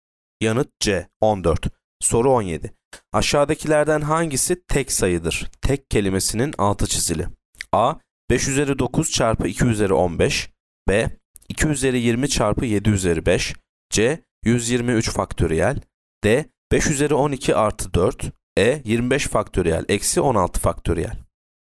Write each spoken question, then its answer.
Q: Aşağıdakilerden hangisi tek sayıdır?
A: Yanıt D, 5 üzeri 12 artı 4.